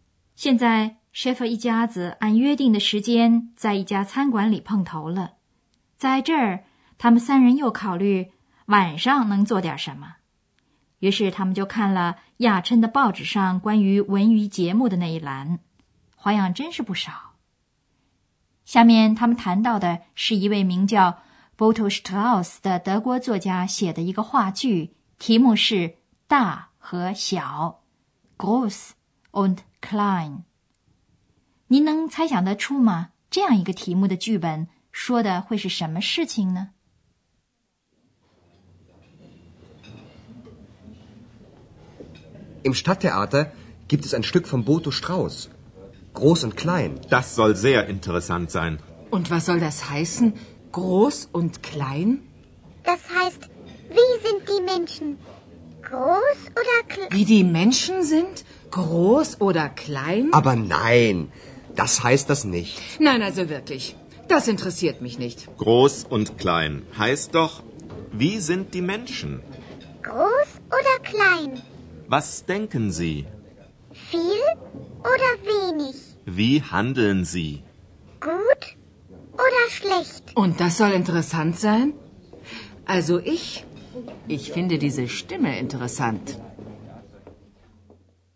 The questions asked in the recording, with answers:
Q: 您能猜想得出吗?这样一个题目的剧本说的会是什么事情呢?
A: Schäfer 先生是这样解释这个题目的意思的。大和小指的是人的性格。